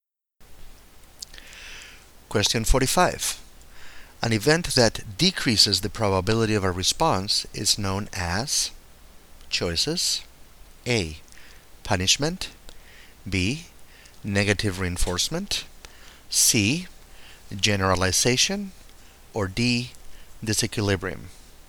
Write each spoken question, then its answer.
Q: An event that decreases the probability of a response is known as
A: The correct choice is A. Punishment.